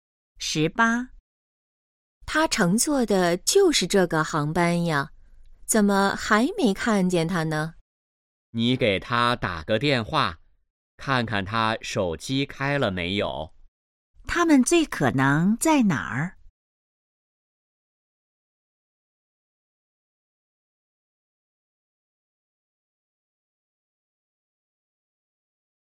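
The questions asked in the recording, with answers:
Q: 他们最可能在哪儿?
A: 机场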